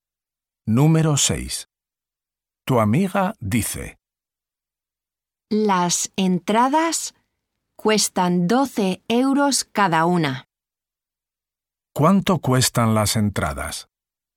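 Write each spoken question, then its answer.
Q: ¿Cuánto cuestan las entradas?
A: 12 euros cada una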